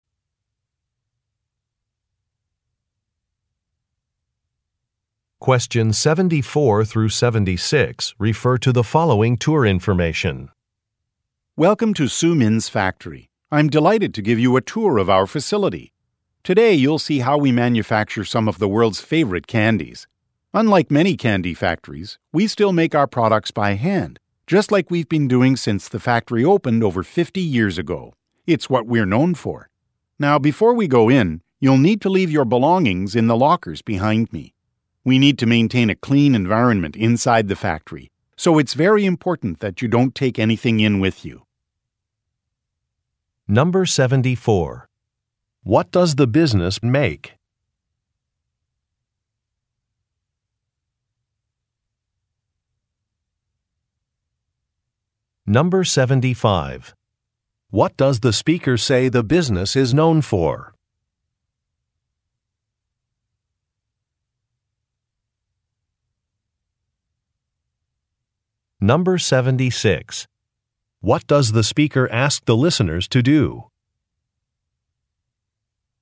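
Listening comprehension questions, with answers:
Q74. What does the business make?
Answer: Candy

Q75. What does the speaker say the business is known for?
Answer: Its handmade products

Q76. What does the speaker ask the listeners to do?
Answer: Leave their personal items in a locker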